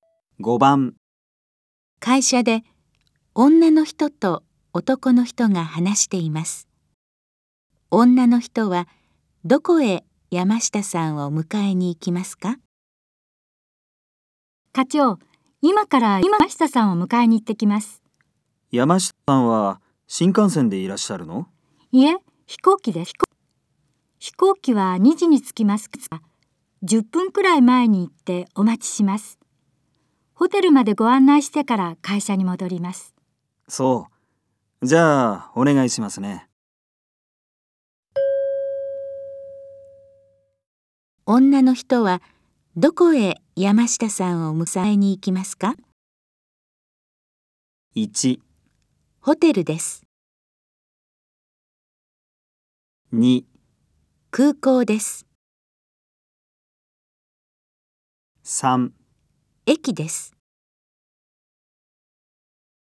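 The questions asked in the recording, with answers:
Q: 女の人はどこへ山下さんを迎えに行きますか?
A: 2: 空港です。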